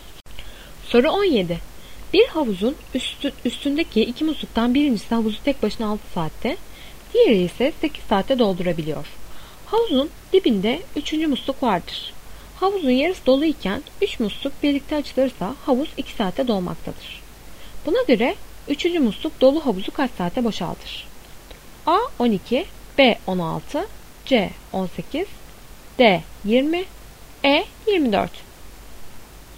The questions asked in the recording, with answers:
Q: Buna göre 3. musluk dolu havuzu kaç saatte boşaltır?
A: Doğru cevap E 24.